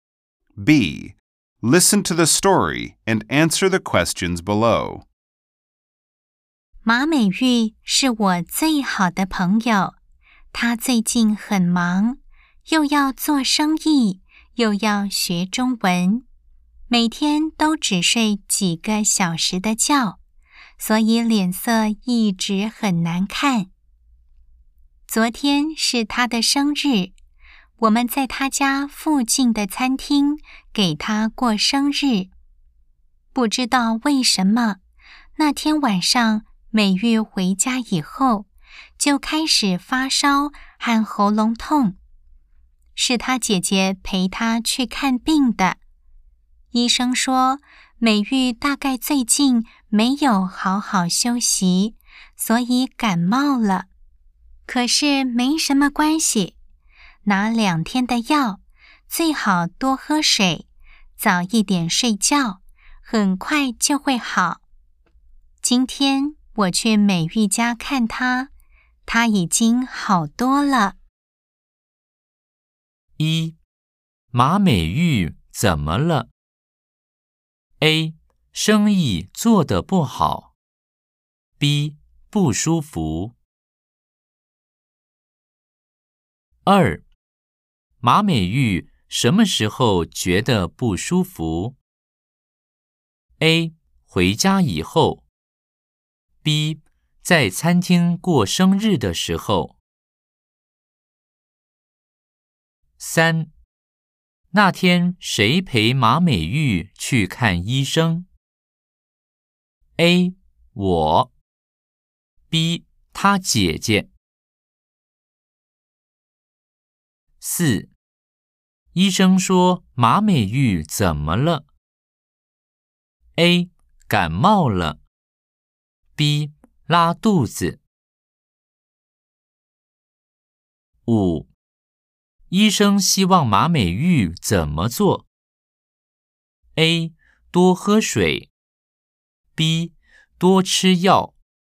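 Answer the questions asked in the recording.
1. B: 不舒服。
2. A: 回家以后。
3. B: 他姐姐。
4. A: 感冒了。
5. A: 多喝水。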